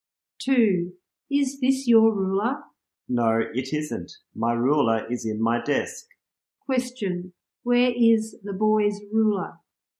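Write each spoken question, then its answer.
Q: Question, where is the boy's ruler?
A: In his desk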